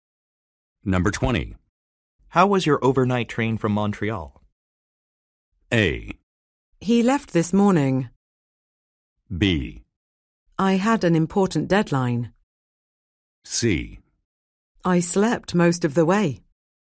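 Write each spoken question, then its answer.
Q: How was your overnight train from Montreal?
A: C: I slept most of the way.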